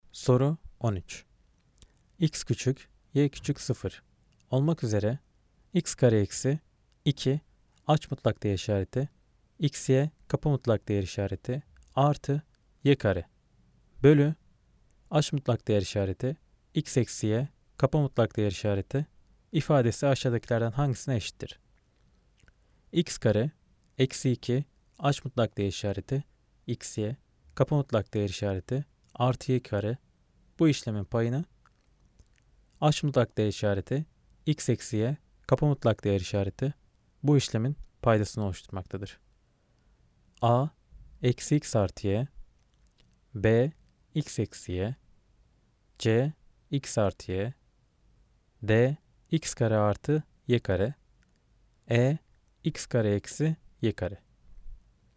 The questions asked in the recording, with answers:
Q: X küçük, y küçük 0 olmak üzere x kare eksi 2 aç mutlak değer işareti x'ye kapı mutlak değer işareti artı y kare bölü aç mutlak değer işareti x eksi y kapı mutlak değer işareti ifadesi aşağıdakilerden hangisine eşittir?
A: Cevap eksi x artı y. Cevap A eksi x artı y.